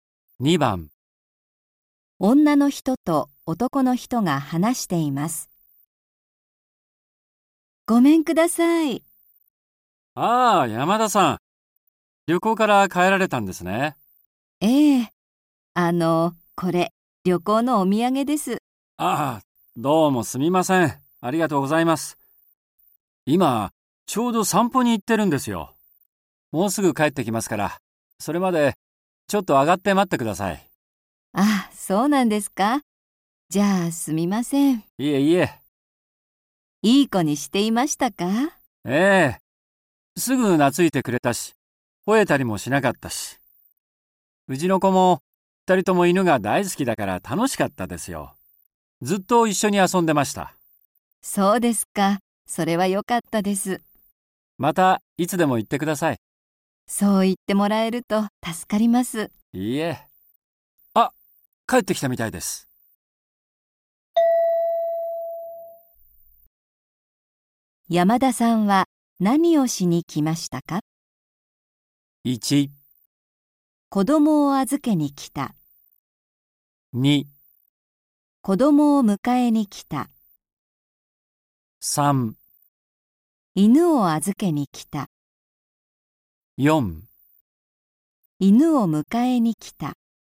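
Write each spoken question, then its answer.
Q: 山田さんは何をしに来ましたか?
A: 4: 犬を迎えに来た。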